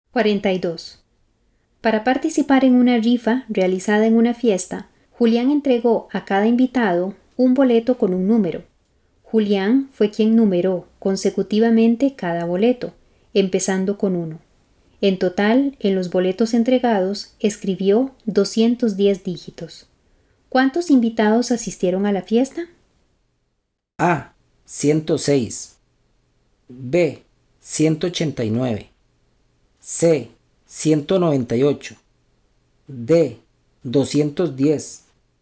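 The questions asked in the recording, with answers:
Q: ¿Cuántos invitados asistieron a la fiesta?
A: A: 106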